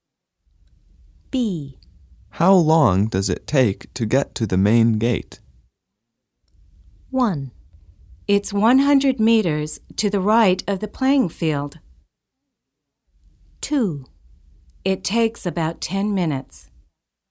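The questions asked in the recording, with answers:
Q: How long does it take to get to the main gate?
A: 2: It takes about 10 minutes.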